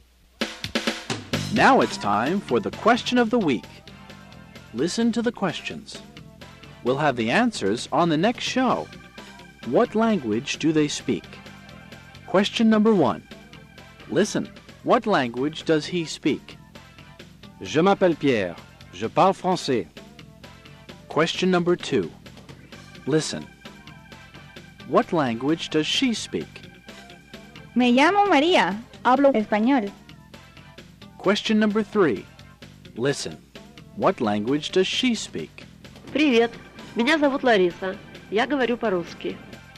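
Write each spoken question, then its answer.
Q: what language does he speak?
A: French

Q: What language does she speak?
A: Spanish

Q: What language does she speak?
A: Russian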